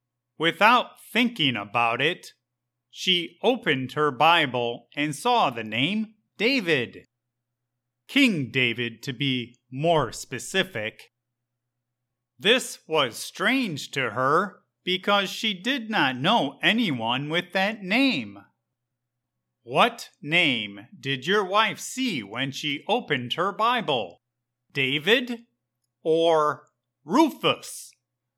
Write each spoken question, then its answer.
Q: What name did your wife see when she opened her Bible?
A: When my wife opened her Bible, she saw the name David, referring to King David.